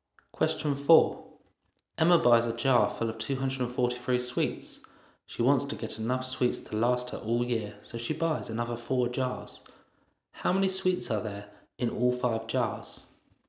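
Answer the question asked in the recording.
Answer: 1,215 sweets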